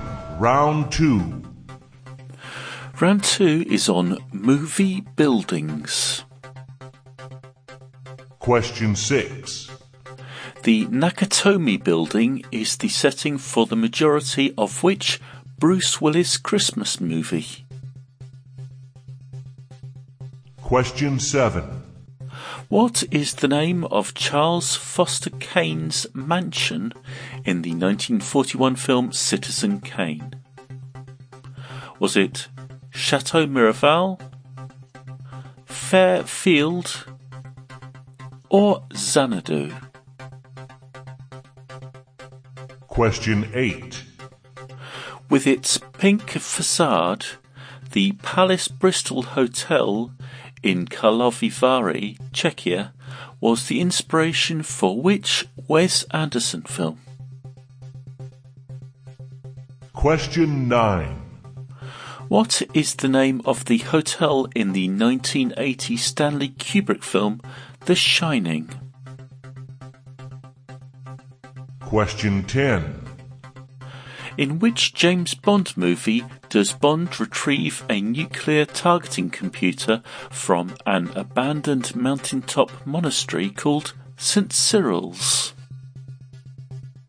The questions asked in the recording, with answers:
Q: The Nakatomi Building is the setting for the majority of which Bruce Willis Christmas movie?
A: the Nakatomi building, was the setting for Die Hard.

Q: What is the name of Charles Foster Kane's mansion in the 1941 film Citizen Kane?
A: Number 7, Citizen Kane's mansion was called Xanadu.

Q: With its pink facade, the Palace Bristol Hotel in Karlovy Vary, Czechia, was the inspiration for which Wes Anderson film?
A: Number 8, the Palace Bristol Hotel was the inspiration for the Grand Budapest Hotel.

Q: What is the name of the hotel in the 1980 Stanley Kubrick film, The Shining?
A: Number 9, the hotel in The Shining was the Overlook Hotel.

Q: In which James Bond movie does Bond retrieve a nuclear targeting computer from an abandoned mountaintop monastery called St.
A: Cyril's was For Your Eyes Only.